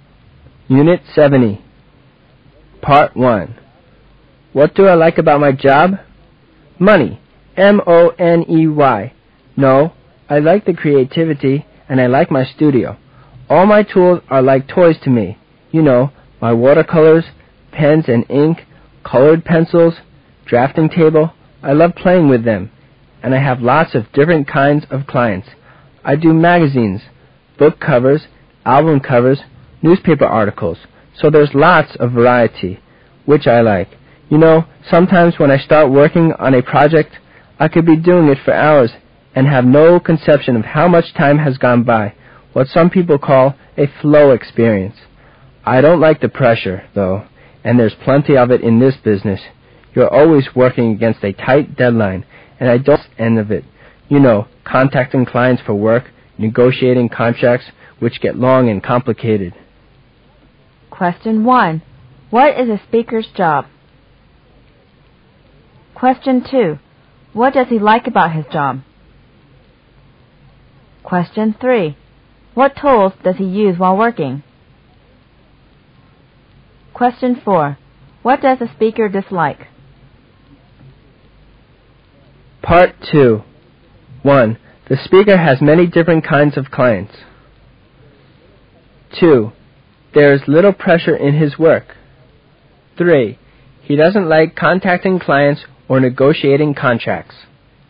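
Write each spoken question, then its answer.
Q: What is a speaker's job?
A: An illustrator/artist

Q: What does he like about his job?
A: The creativity, his studio and the variety

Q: What tools does he use while working?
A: Watercolors, pens and ink, colored pencils, drafting table

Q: What does a speaker dislike?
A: The pressure, deadlines, contacting clients and negotiating contracts

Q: The speaker has many different kinds of clients.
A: True

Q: There is little pressure in his work.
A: False

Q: He doesn't like contacting clients or negotiating contracts.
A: True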